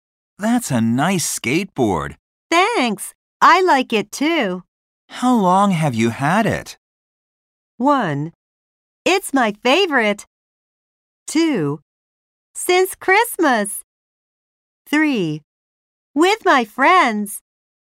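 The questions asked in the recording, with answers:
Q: How long have you had it?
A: 2: Since Christmas.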